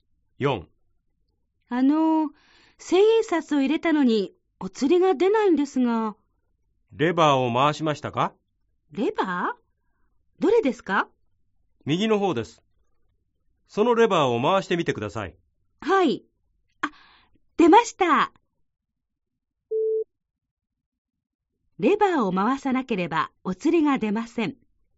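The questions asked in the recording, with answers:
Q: レバーを回さなければお釣りが出ません。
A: ○(正しい)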